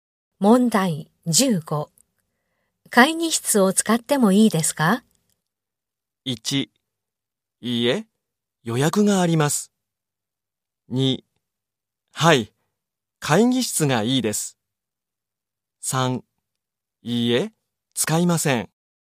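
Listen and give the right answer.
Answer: 1: いいえ、予約があります。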